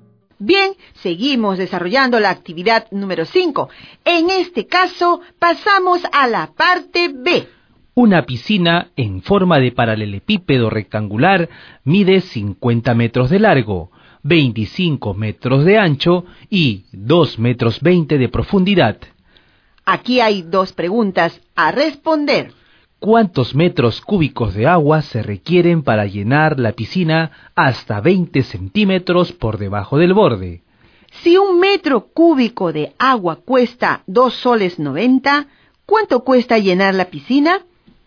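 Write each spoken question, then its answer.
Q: ¿Cuántos metros cúbicos de agua se requieren para llenar la piscina hasta 20 centímetros por debajo del borde?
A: 2500 metros cúbicos

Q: Si un metro cúbico de agua cuesta 2 soles 90, ¿cuánto cuesta llenar la piscina?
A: 7250 soles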